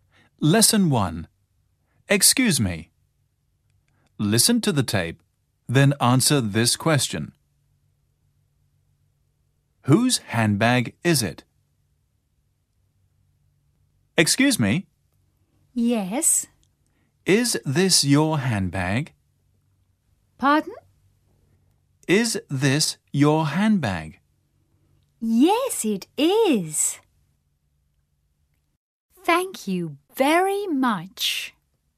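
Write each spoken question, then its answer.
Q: Whose handbag is it?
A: It is the woman's handbag (the person spoken to).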